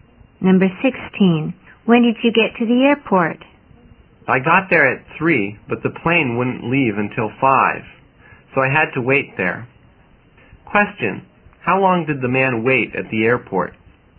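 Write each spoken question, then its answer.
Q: how long did the man wait at the airport?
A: Two hours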